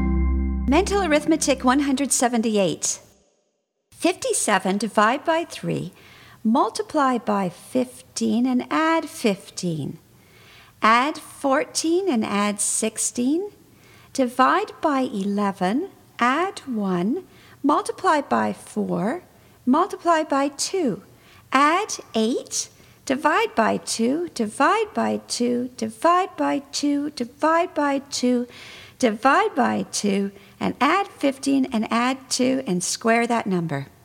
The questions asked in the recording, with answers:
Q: 57 divide by 3, multiply by 15 and add 15. Add 14 and add 16. Divide by 11, add 1, multiply by 4, multiply by 2. Add 8, divide by 2, divide by 2, divide by 2, divide by 2, divide by 2, and add 15 and add 2 and square that number.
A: 625.